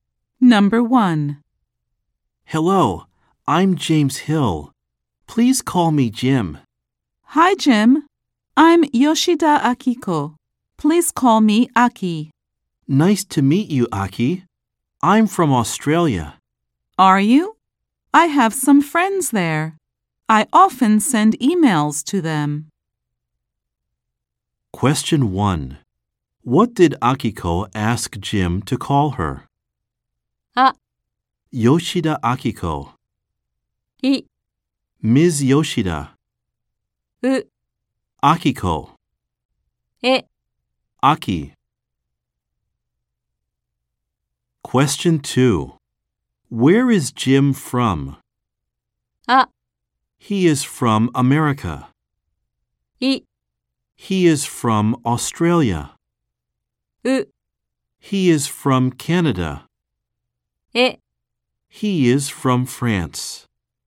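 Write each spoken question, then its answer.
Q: What did Akiko ask Jim to call her?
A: E: Aki.

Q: Where is Jim from?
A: I: He is from Australia.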